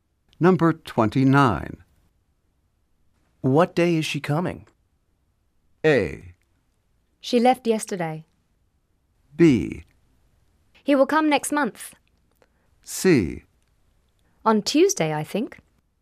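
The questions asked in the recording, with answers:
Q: What day is she coming?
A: C: On Tuesday, I think.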